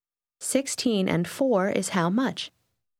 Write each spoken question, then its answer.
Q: 16 and 4 is how much?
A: 20.